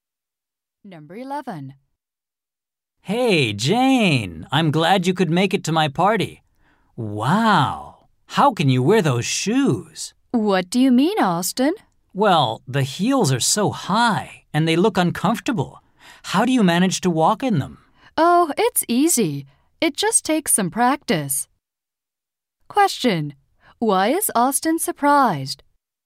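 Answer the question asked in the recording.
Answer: Jane's shoes have very high heels.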